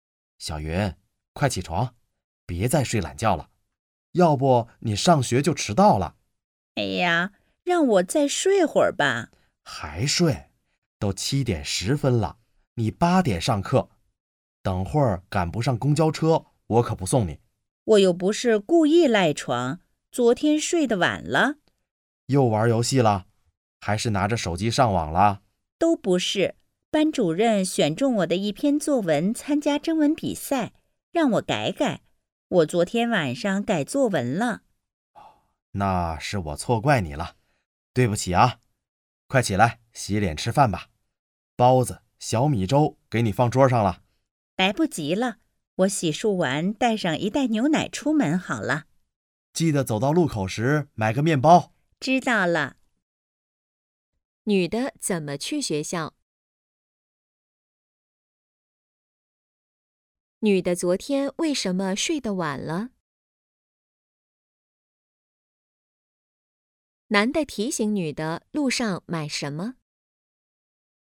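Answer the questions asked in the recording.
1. 坐公交车
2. 改作文
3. 面包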